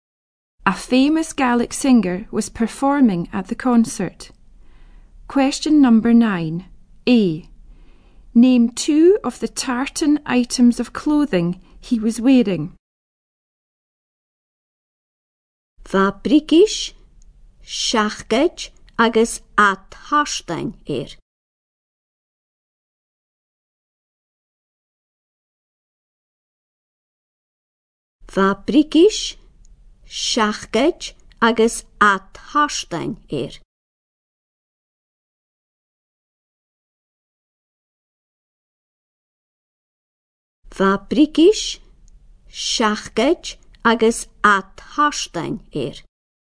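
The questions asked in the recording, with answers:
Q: Name two of the tartan items of clothing he was wearing.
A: Trousers, jacket, hat (any two)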